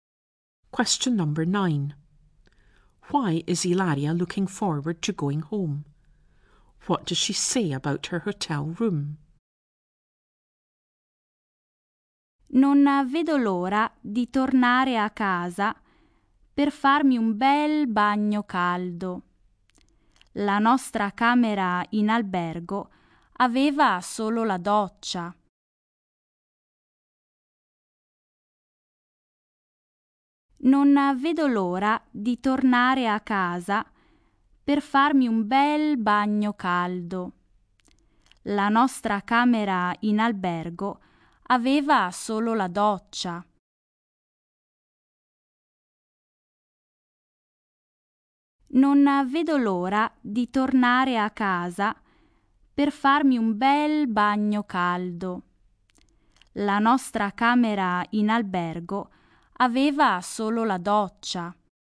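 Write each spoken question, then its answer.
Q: Why is Ilaria looking forward to going home?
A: To have a nice hot bath

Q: What does she say about her hotel room?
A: It only had a shower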